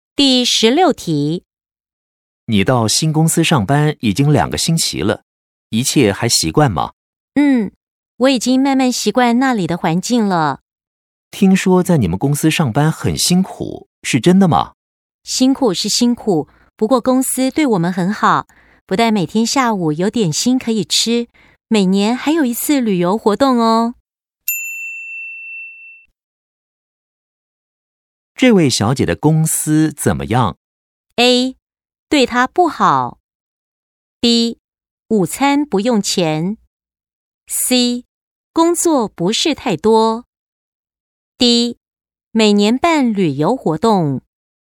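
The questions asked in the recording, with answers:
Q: 这位小姐的公司怎么样?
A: D: 每年办旅游活动。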